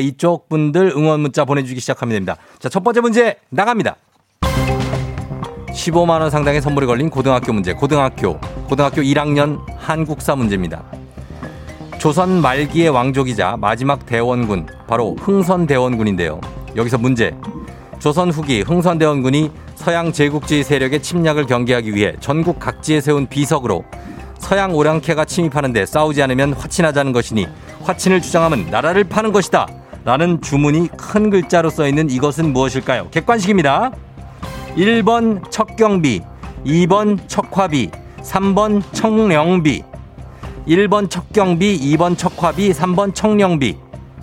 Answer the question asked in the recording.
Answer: 2번 척화비. 네. 정답입니다.